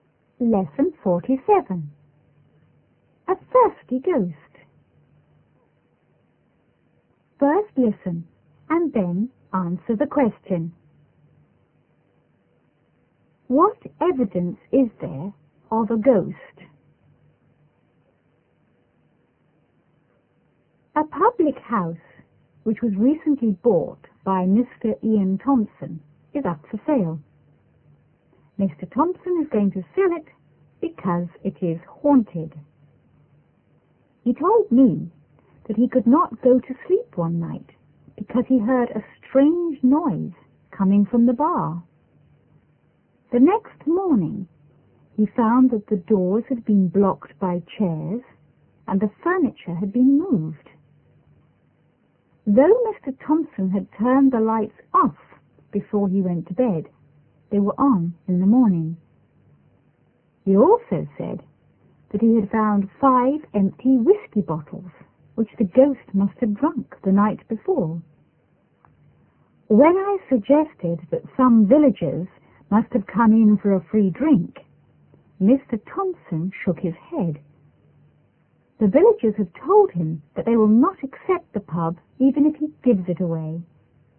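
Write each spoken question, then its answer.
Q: What evidence is there of a ghost?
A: Strange noises from the bar, doors blocked by chairs, furniture moved, lights turned on, and five empty whisky bottles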